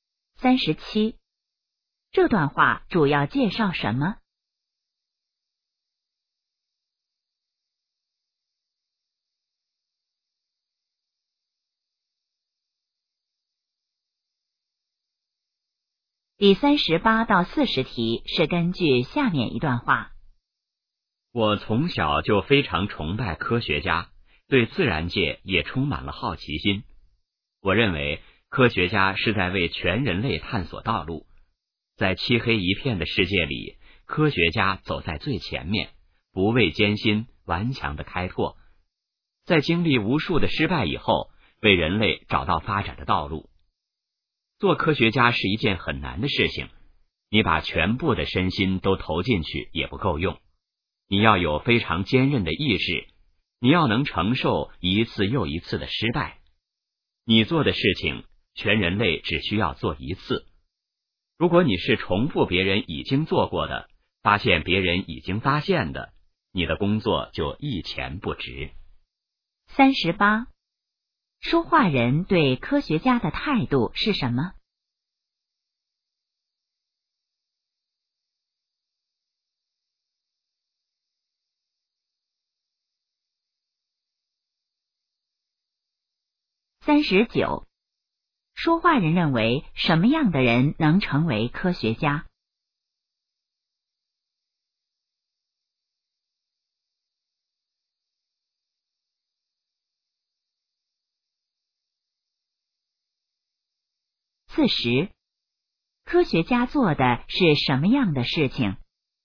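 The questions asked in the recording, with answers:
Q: 说话人对科学家的态度是什么?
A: 崇拜

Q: 说话人认为什么样的人能成为科学家?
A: 意志坚韧、能承受一次次失败的人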